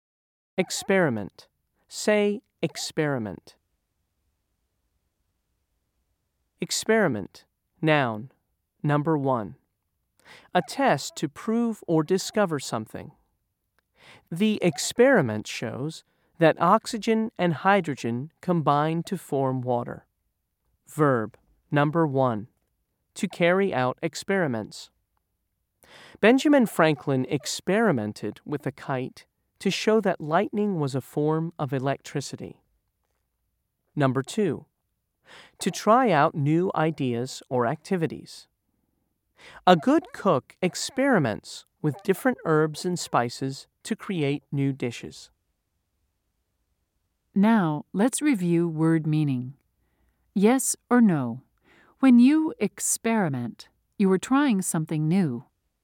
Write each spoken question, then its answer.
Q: Yes or no? When you experiment, you are trying something new.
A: If you said yes, you are correct.